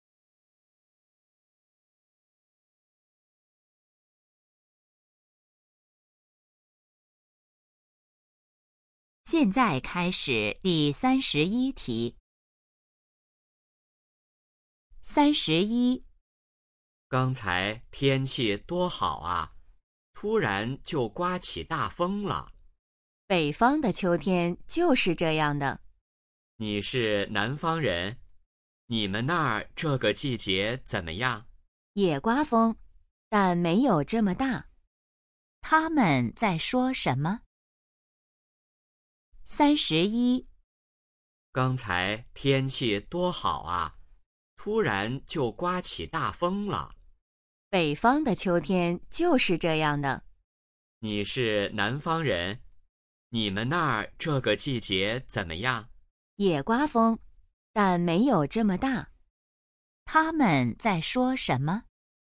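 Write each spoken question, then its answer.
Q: 他们在说什么?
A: 天气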